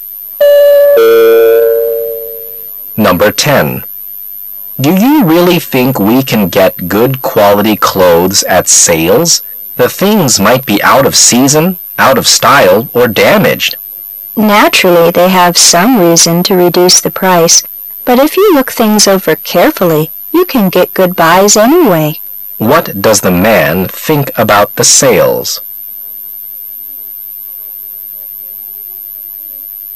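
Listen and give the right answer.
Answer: You can get good buys if you look things over carefully

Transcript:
[解析] M: Do you really think we can get good quality clothes at sales? The things might be out of season, out of style, or damaged. W: Naturally they have some reason to reduce the price, but if you look things over carefully, you can get good buys anyway. Q: What does the man think about the sales?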